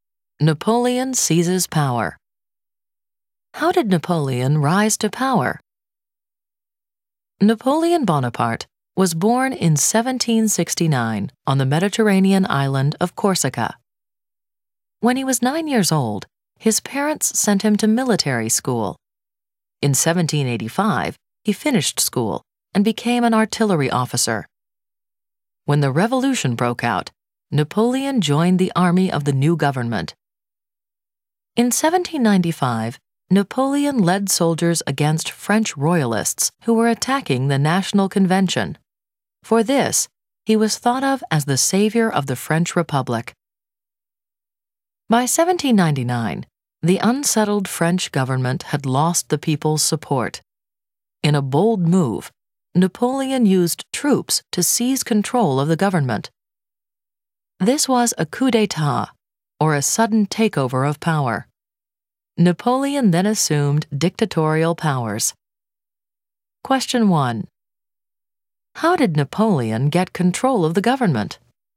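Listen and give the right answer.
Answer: He used troops to seize control in a coup d'état in 1799.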